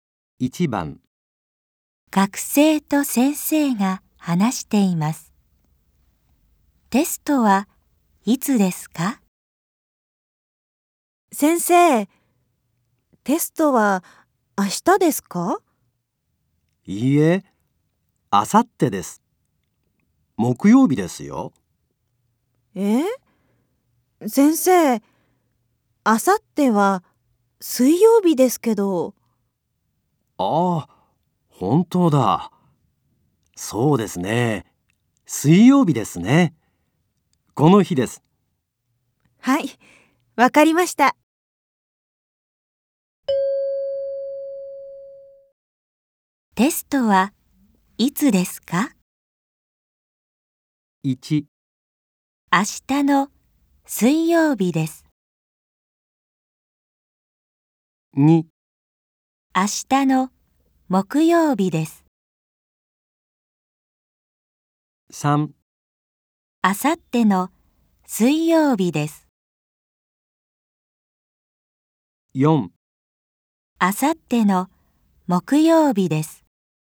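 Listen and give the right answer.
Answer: 3: あさっての水曜日です。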